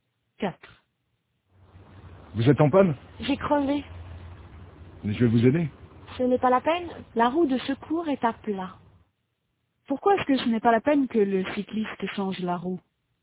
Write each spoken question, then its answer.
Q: Pourquoi est-ce que ce n'est pas la peine que le cycliste change la roue?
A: Parce que la roue de secours est à plat.